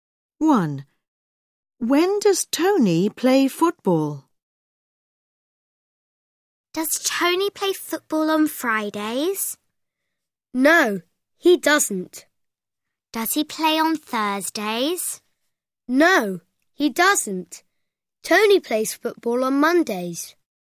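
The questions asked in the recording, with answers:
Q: When does Tony play football?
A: On Mondays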